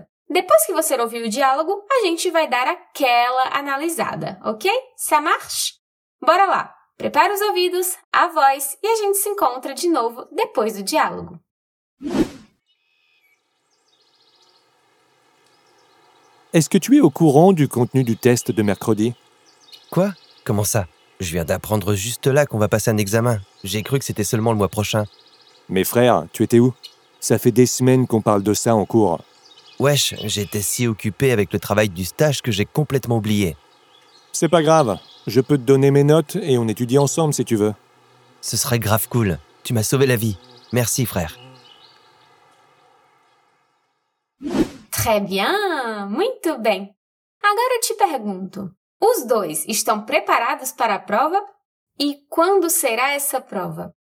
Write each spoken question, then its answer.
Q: E quando será essa prova?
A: Mercredi, quarta-feira,